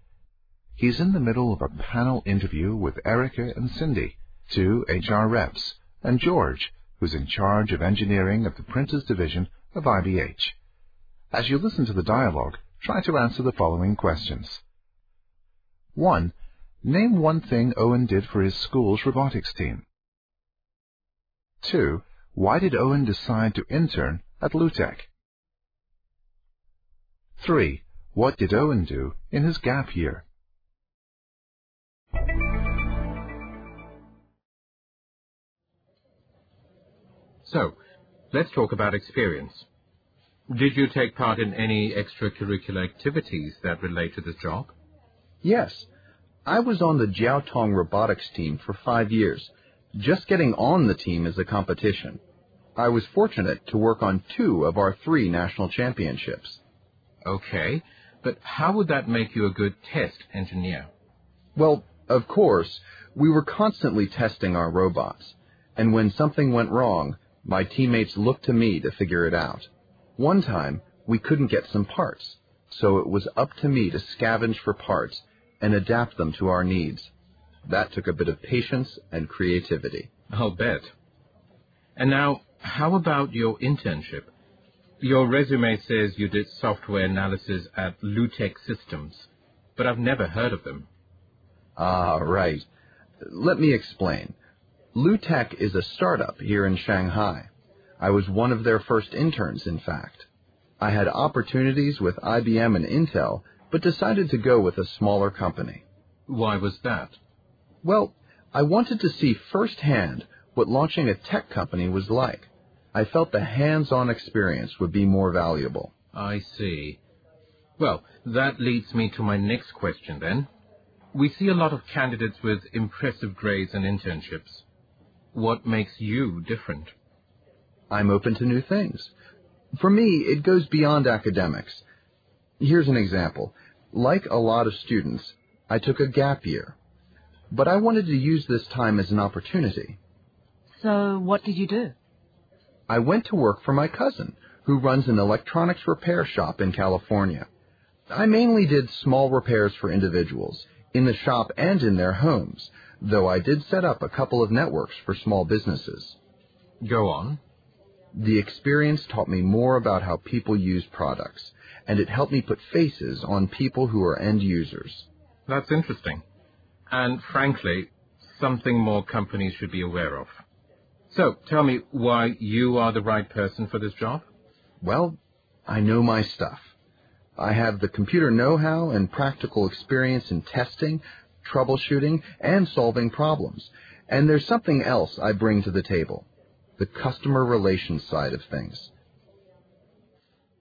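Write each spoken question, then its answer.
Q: Name one thing Owen did for his school's robotics team.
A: He figured out problems when something went wrong, for example by scavenging for parts and adapting them.

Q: Why did Owen decide to intern at LUTEC?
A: He wanted to see firsthand what launching a tech company was like; he felt the hands-on experience would be more valuable.

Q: What did Owen do in his gap year?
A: He worked at his cousin's electronics repair shop in California, doing repairs and setting up networks.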